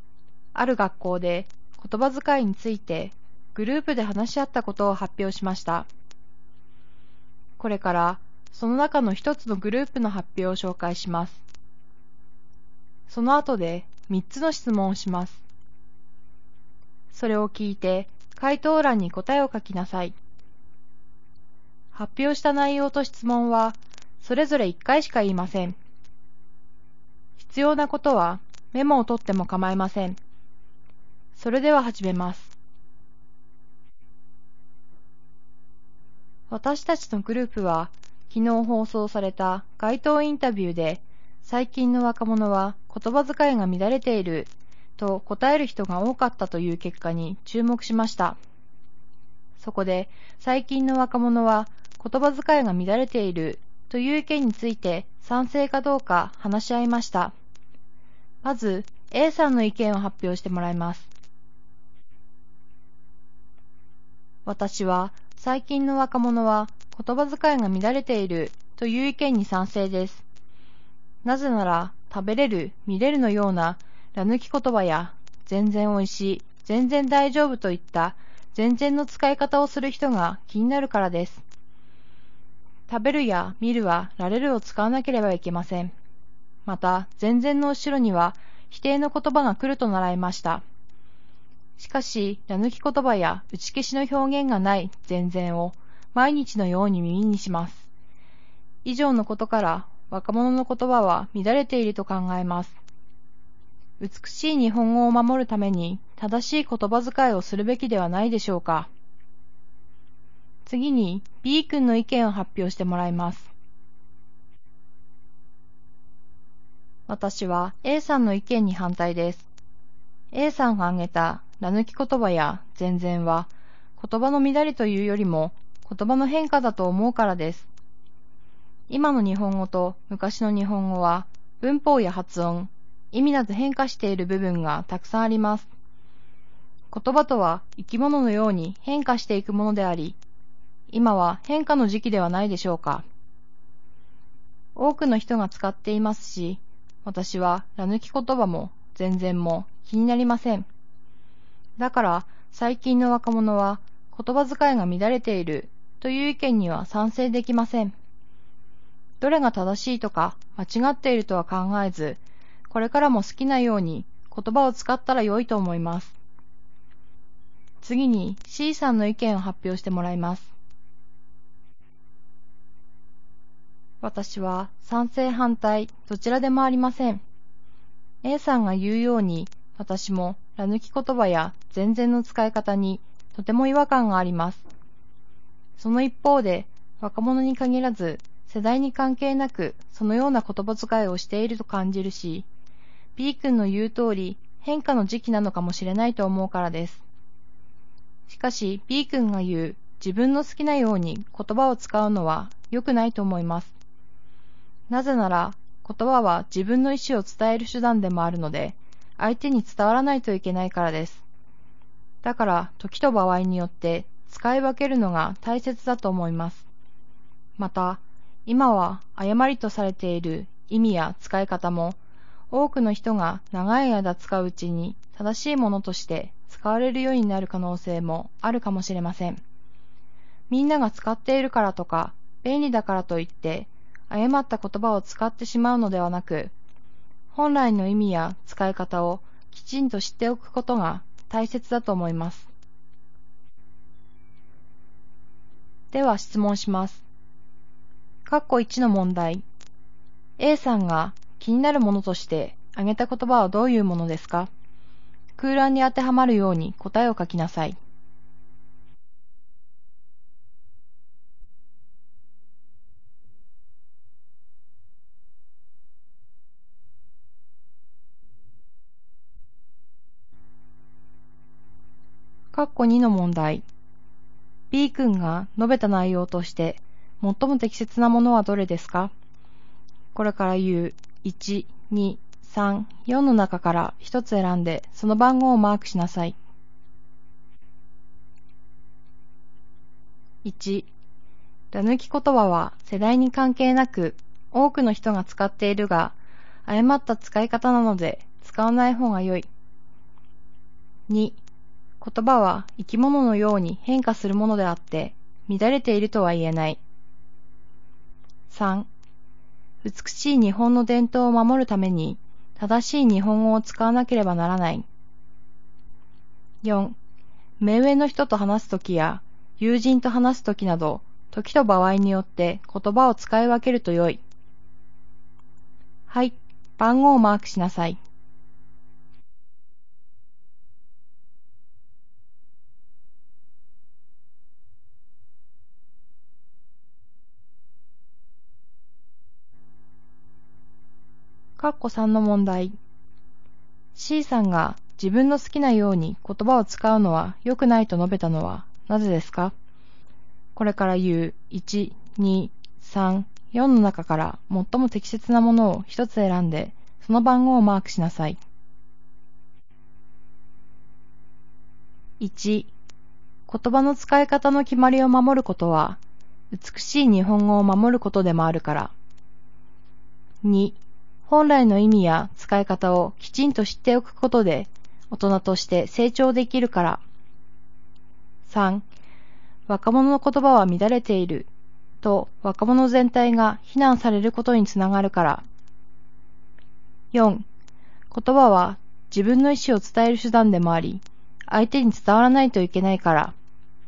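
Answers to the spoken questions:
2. 2: 言葉は生き物のように変化するものであって、乱れているとは言えない。
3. 4: 言葉は自分の意思を伝える手段でもあり、相手に伝わらないといけないから。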